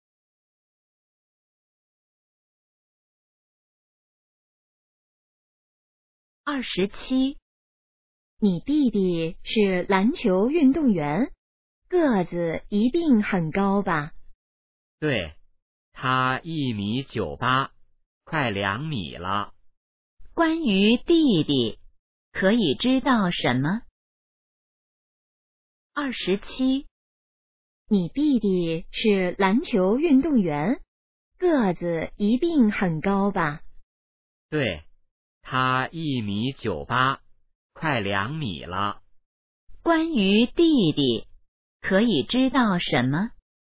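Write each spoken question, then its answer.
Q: 关于弟弟,可以知道什么?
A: 个子很高,快2米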